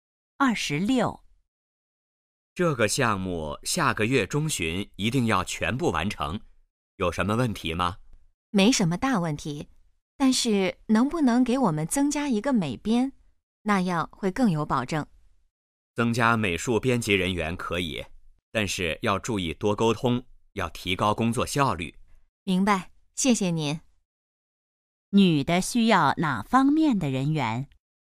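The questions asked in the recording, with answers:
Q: 女的需要哪方面的人员?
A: 美术编辑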